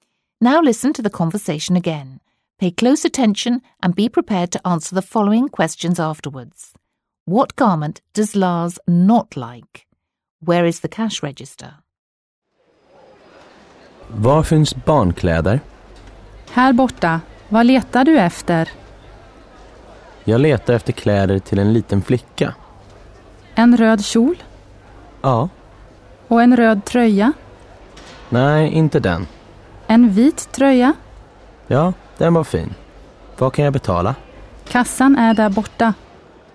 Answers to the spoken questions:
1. You were correct if you said the red top.
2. Did you say over there? In that case, you were right again.